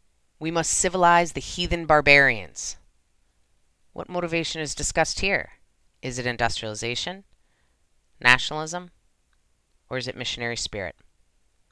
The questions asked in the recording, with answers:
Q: What motivation is discussed here?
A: If you said missionary spirit, you are correct.